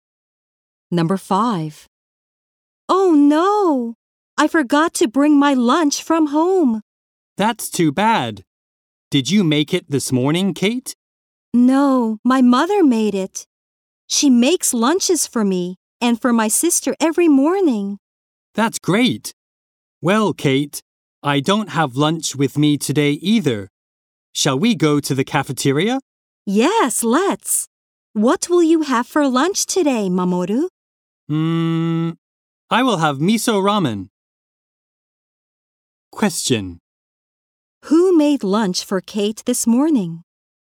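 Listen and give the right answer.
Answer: Her mother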